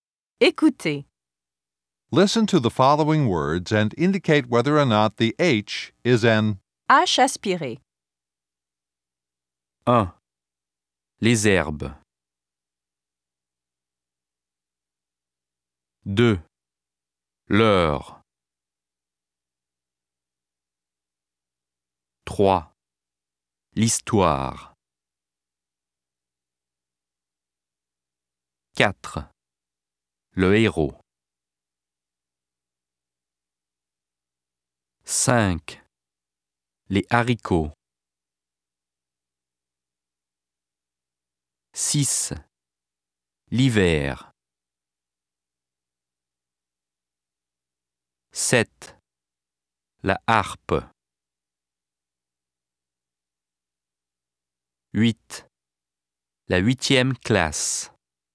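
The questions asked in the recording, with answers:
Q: L'heure.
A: not H aspiré

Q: L'histoire.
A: not H aspiré

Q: Le héros.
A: H aspiré

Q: L'hiver.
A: not H aspiré

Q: La harpe.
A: H aspiré

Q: La huitième classe.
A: H aspiré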